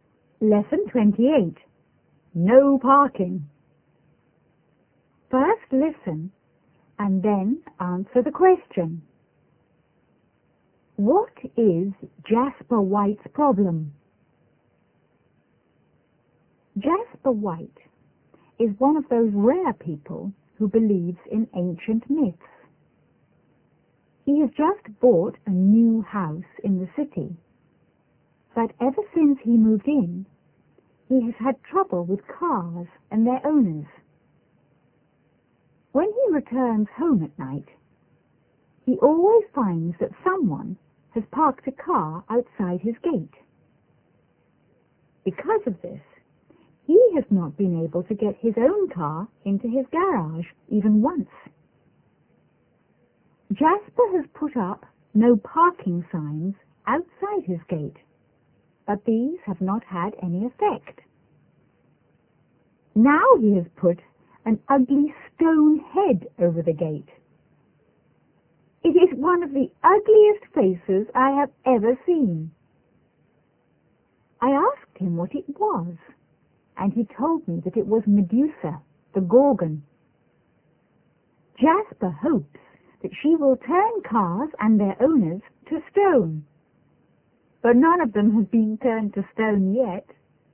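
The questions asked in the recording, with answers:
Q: What is Jasper White's problem?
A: People always park their cars outside his gate, so he can't get his car into his garage.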